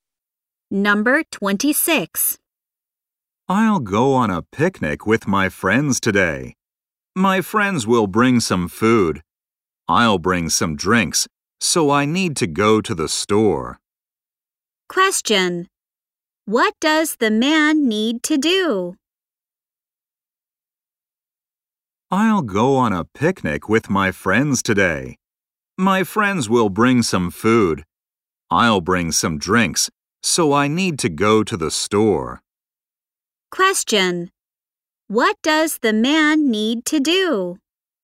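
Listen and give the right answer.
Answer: Go to the store to buy drinks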